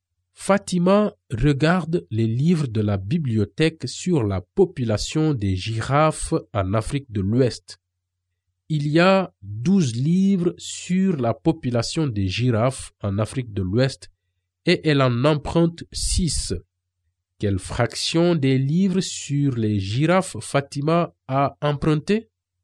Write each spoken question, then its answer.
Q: Quelle fraction des livres sur les girafes Fatima a emprunté?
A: 6 douzièmes des livres.